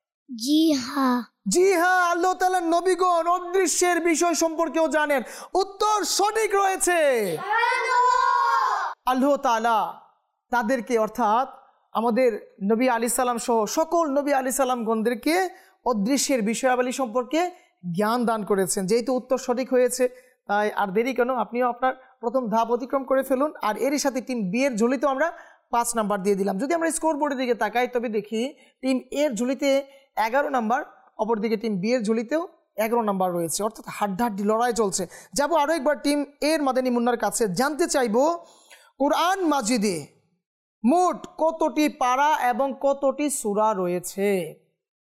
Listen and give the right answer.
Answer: কোরআন মজিদে মোট 30 পারা রয়েছে এবং 114টি সূরা।